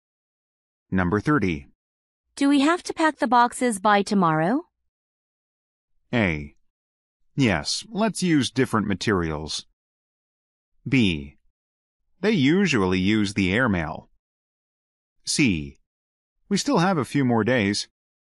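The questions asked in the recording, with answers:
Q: Do we have to pack the boxes by tomorrow?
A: C: We still have a few more days.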